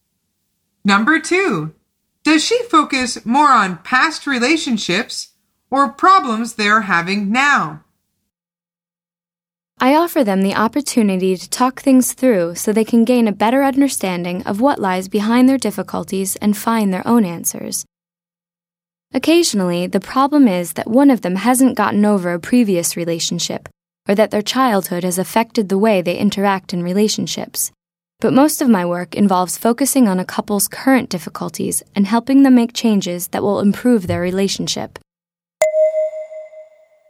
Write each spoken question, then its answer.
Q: Does she focus more on past relationships or problems they're having now?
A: The answer is problems they are having now.